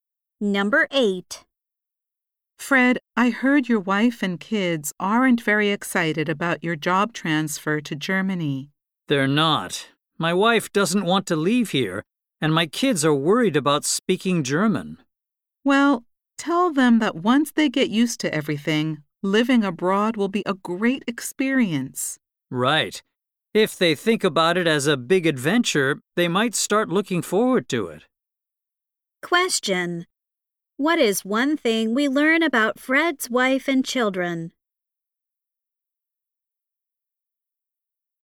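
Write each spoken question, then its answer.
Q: What is one thing we learn about Fred's wife and children?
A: They don't want to move to Germany.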